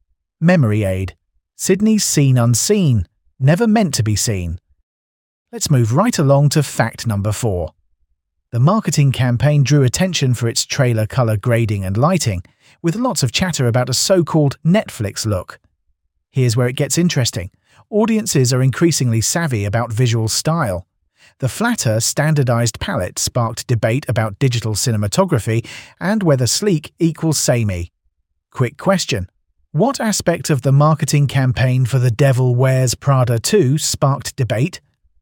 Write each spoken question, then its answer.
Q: What aspect of the marketing campaign for The Devil Wears Prada 2 sparked debate?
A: Correct answer, trailer color grading.